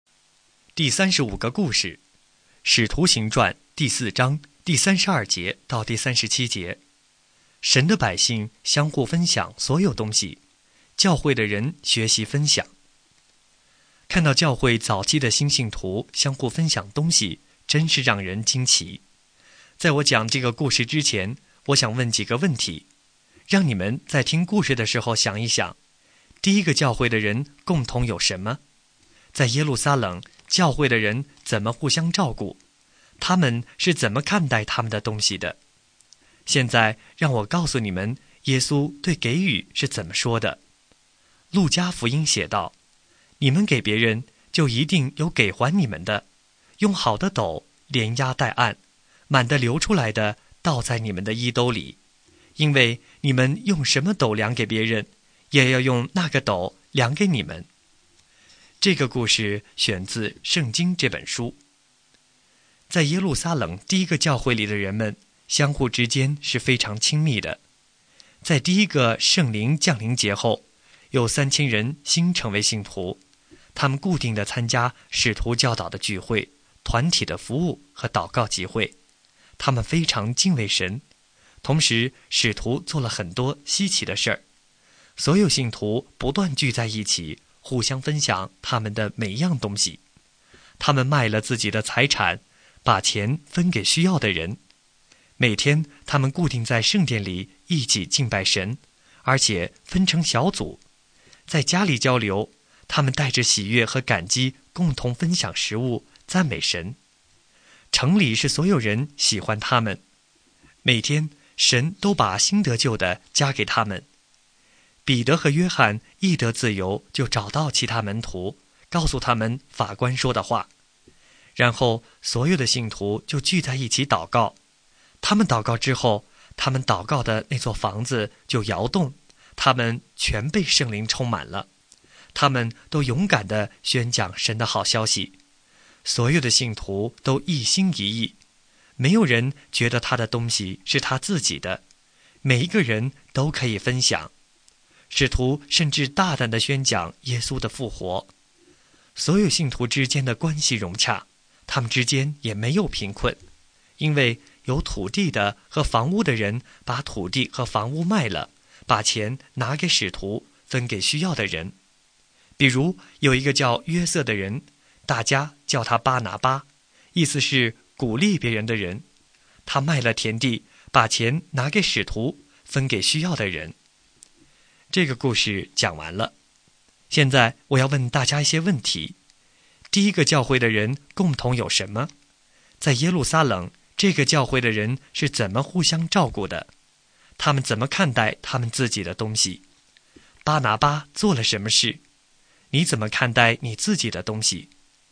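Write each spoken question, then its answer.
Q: 第一个教会的人共同有什么?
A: 他们共同分享所有东西

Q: 在耶路撒冷,这个教会的人是怎么互相照顾的?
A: 卖了财产和房地,把钱分给需要的人

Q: 他们怎么看待他们自己的东西?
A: 没有人觉得他的东西是他自己的,每个人都可以分享

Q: 巴拿巴做了什么事?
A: 卖了田地,把钱拿给使徒分给需要的人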